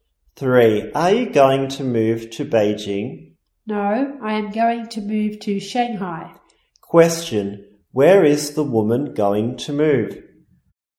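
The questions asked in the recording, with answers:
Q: Where is the woman going to move?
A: Shanghai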